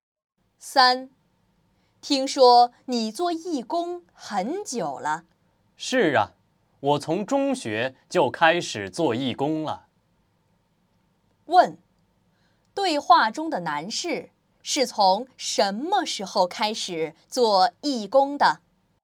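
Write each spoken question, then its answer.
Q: 对话中的男士是从什么时候开始做义工的?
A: 从中学开始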